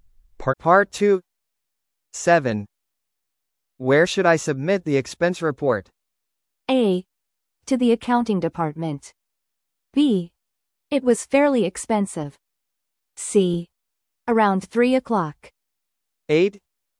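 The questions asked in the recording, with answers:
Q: Where should I submit the expense report?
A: A: To the accounting department.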